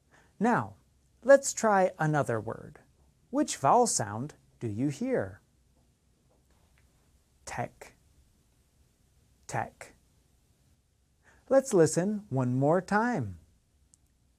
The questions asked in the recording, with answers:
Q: Which vowel sound do you hear?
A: The answer is E, tech.